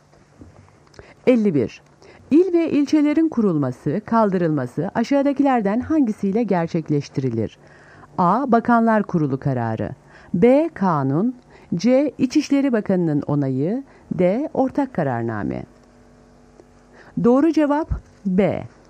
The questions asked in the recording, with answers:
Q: İl ve ilçelerin kurulması, kaldırılması aşağıdakilerden hangisiyle gerçekleştirilir?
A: Doğru cevap B. Kanun.